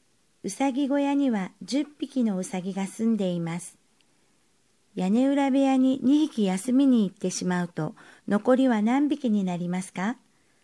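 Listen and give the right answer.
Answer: 8匹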